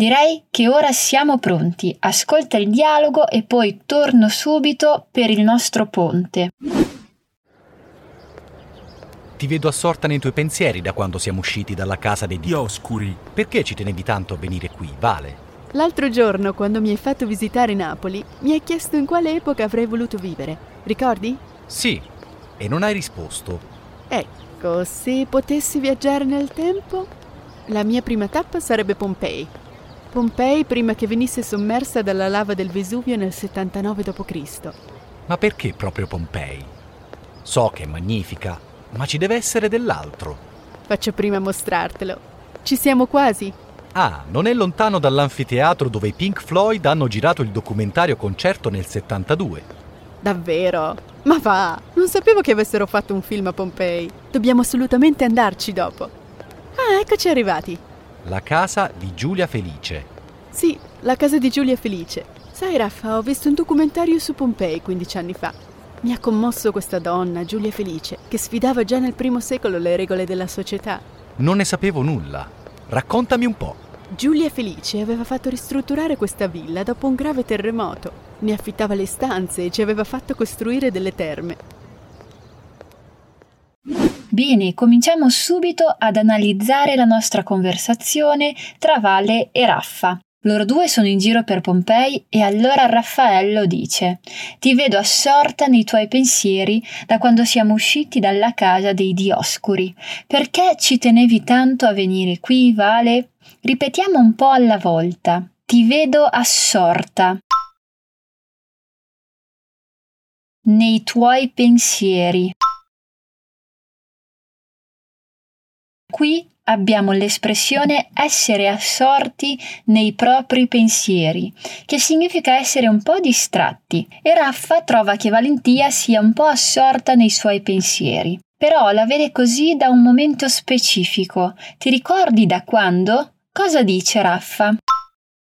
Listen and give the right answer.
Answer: Da quando siamo usciti dalla casa dei Dioscuri.